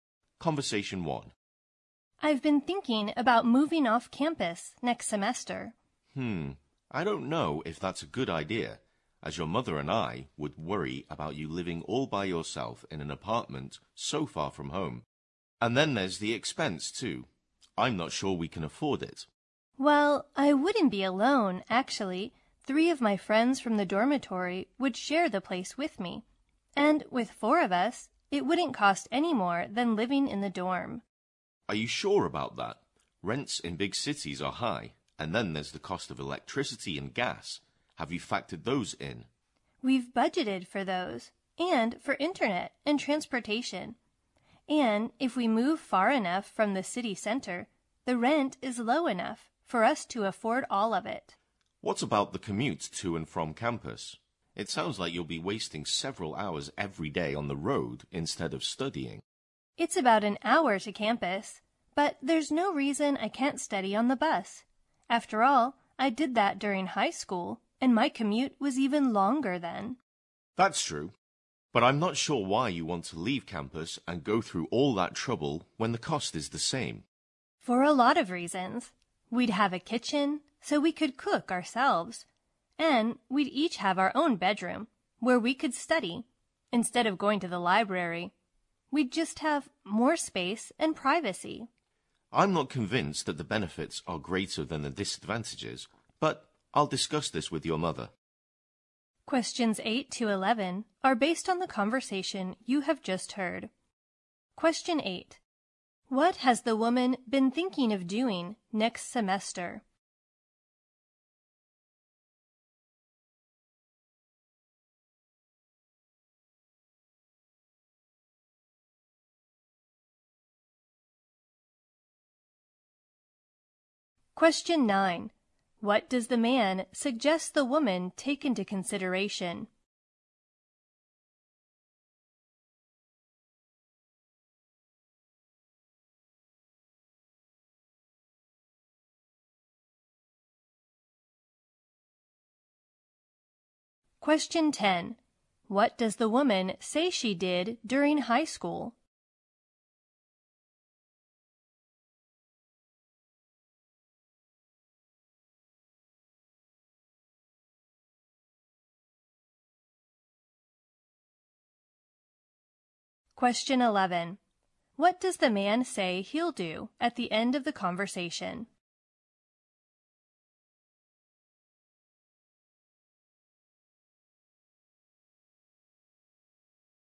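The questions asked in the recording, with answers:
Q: What has the woman been thinking of doing next semester?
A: Moving off campus

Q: What does the man suggest the woman take into consideration?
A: The cost of electricity and gas

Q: What does the woman say she did during high school?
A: She studied on the bus during a long commute

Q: What does the man say he'll do at the end of the conversation?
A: Discuss it with her mother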